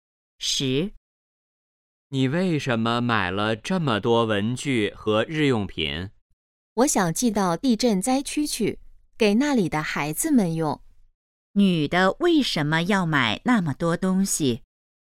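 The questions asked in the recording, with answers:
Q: 女的为什么要买那么多东西?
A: 寄给地震灾区的孩子们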